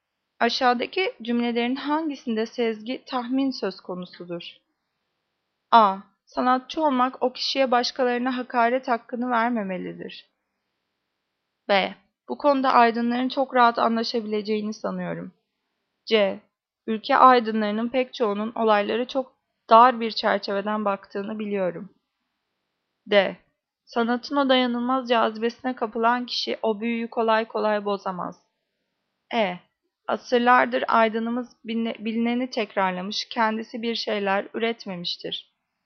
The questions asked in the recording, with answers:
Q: Aşağıdaki cümlelerin hangisinde sezgi, tahmin söz konusudur?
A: Cevap B. Bu konuda aydınların çok rahat anlaşabileceğini sanıyorum.